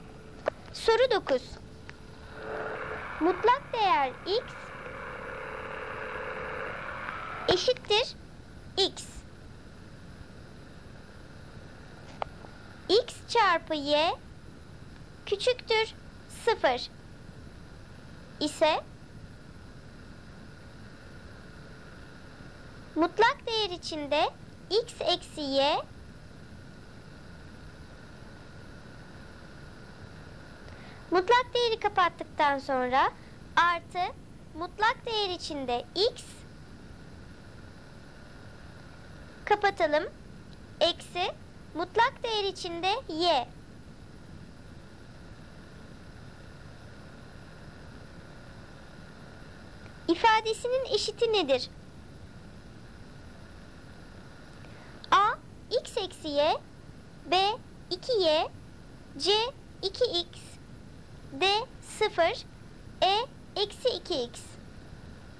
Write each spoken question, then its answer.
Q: ifadesinin eşiti nedir?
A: doğru cevap c 2x.